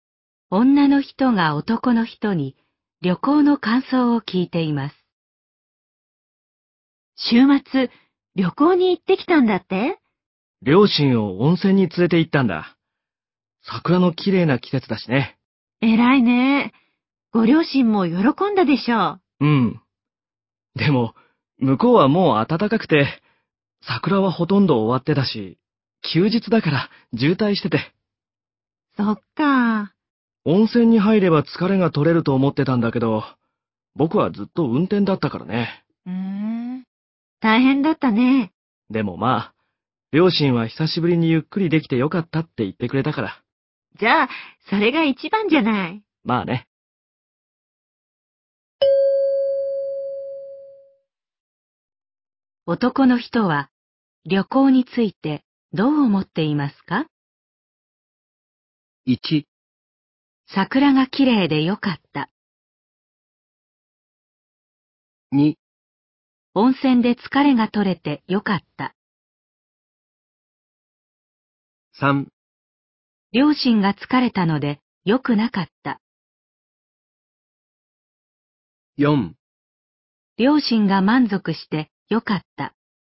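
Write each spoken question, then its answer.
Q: 男の人は旅行についてどう思っていますか?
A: 4: 両親が満足してよかった。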